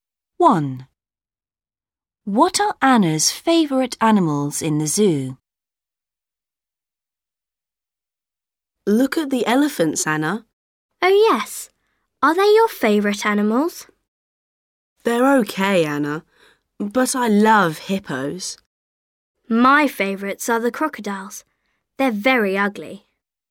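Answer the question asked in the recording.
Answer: crocodiles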